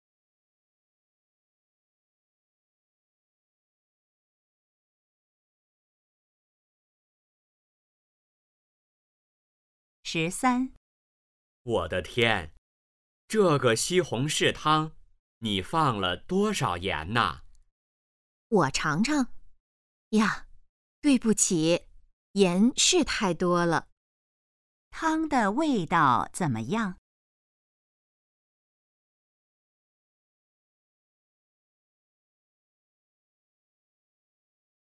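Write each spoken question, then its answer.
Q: 汤的味道怎么样?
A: 太咸了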